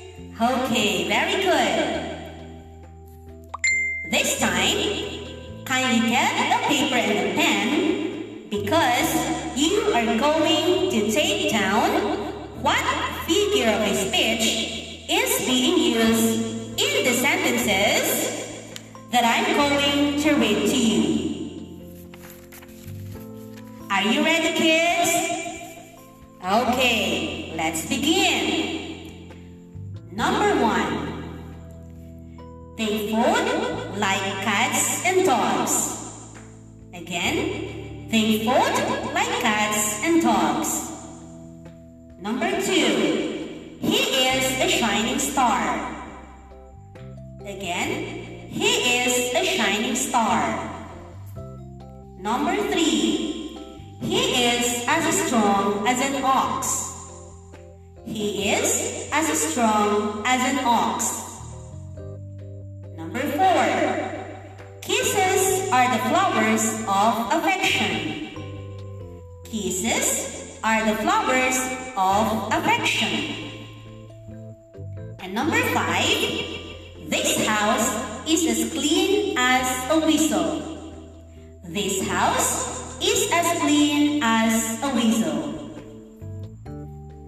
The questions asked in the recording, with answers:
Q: Number one, they fought like cats and dogs.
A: The answer is simile.

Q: Number two, he is a shining star.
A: The answer is metaphor.

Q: Number three, he is as strong as an ox.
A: It's simile.

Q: Number four, kisses are the flowers of affection.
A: The answer is metaphor.

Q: And number five, this house is as clean as a whistle.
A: The answer is simile.